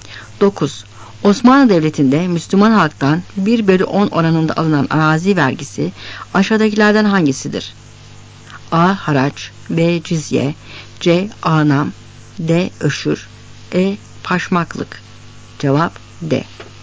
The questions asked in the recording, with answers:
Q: Osmanlı Devleti'nde Müslüman halktan 1/10 oranında alınan arazi vergisi aşağıdakilerden hangisidir?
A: Cevap D.